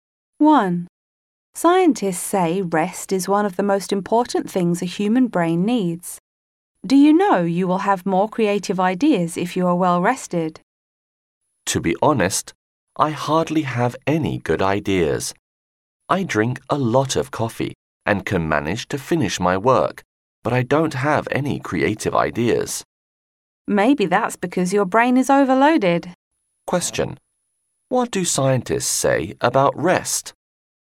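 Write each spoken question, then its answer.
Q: What do scientists say about rest?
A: Rest is one of the most important things a human brain needs.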